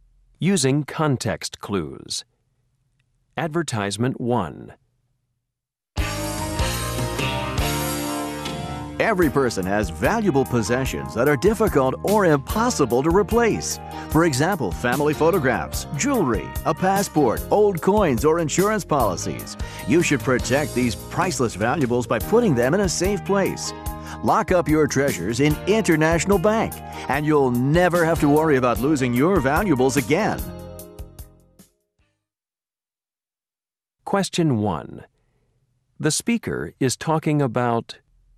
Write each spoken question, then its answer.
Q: The speaker is talking about...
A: The International Bank Safe Deposit Box.